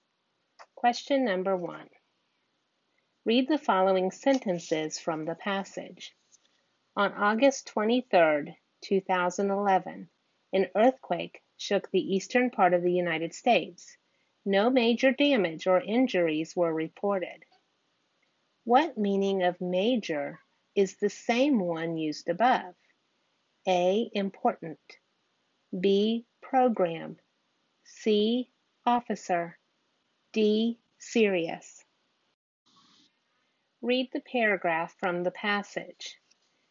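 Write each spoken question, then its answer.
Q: What meaning of major is the same one used above?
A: D: Serious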